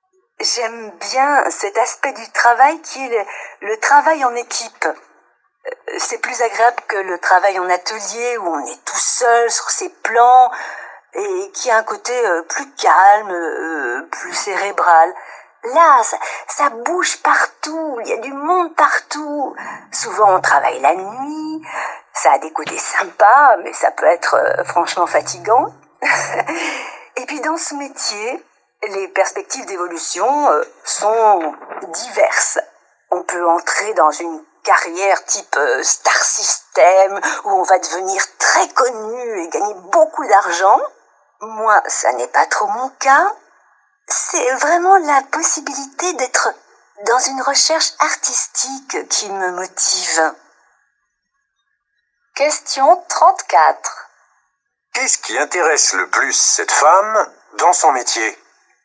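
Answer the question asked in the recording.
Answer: La possibilité d'être dans une recherche artistique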